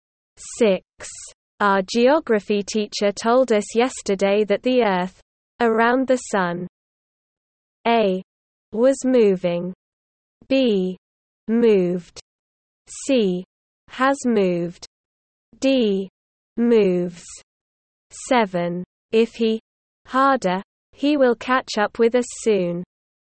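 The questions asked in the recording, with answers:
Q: Our geography teacher told us yesterday that the Earth, around the sun.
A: D: Moves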